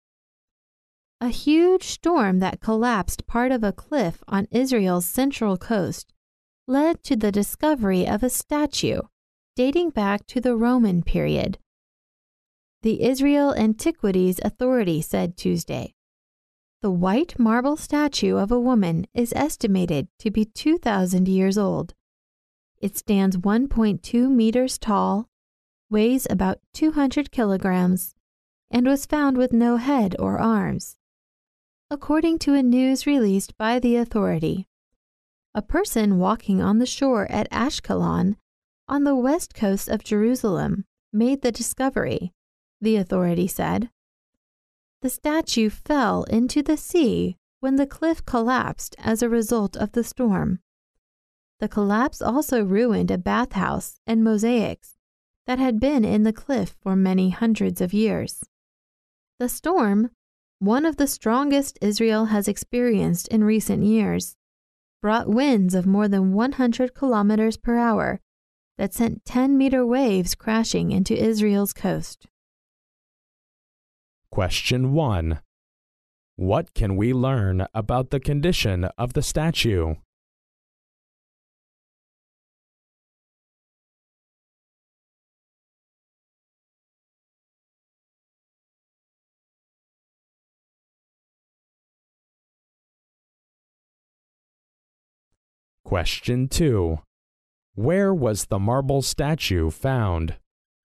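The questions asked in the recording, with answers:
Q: What can we learn about the condition of the statue?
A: It was found with no head or arms.

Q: Where was the marble statue found?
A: On the shore at Ashkelon, on Israel's coast.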